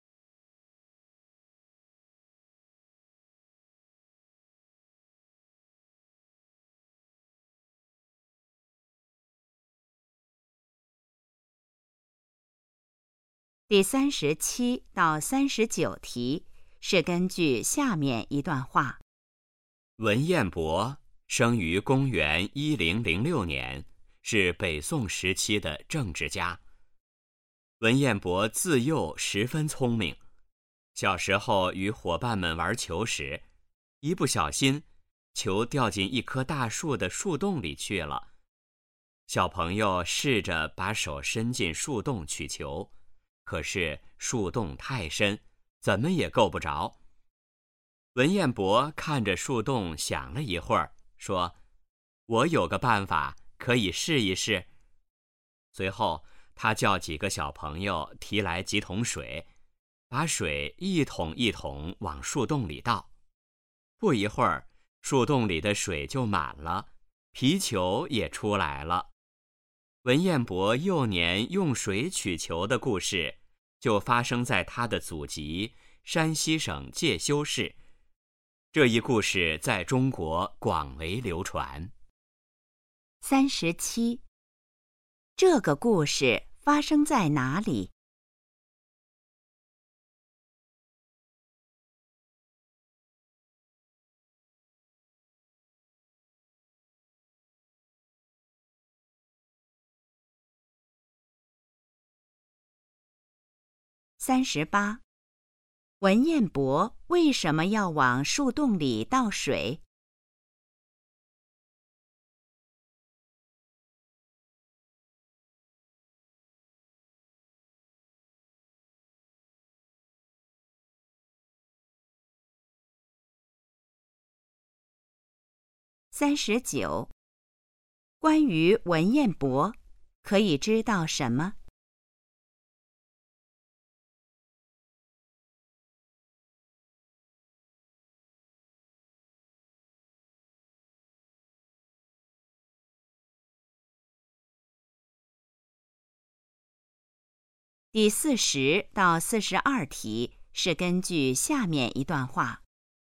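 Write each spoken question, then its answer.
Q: 这个故事发生在哪里?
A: 山西省介休市

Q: 文彦博为什么要往树洞里倒水?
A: 让球浮出来

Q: 关于文彦博,可以知道什么?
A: 他从小很聪明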